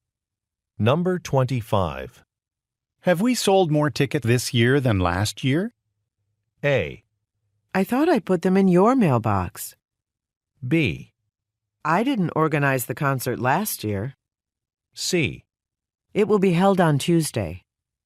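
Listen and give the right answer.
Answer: B: I didn't organize the concert last year.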